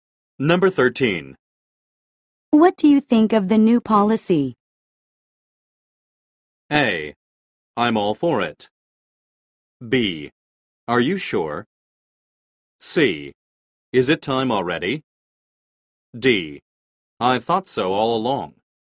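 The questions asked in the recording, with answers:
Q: What do you think of the new policy?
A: A: I'm all for it.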